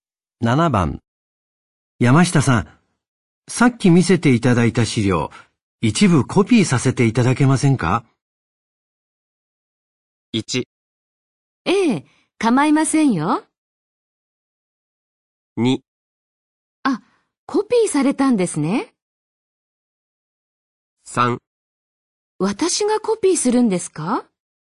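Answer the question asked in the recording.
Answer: 1: ええ、構いませんよ。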